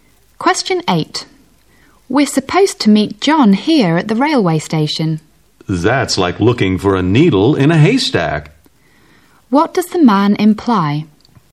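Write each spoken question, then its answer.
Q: What does the man imply?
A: It will be very hard to find John at the station.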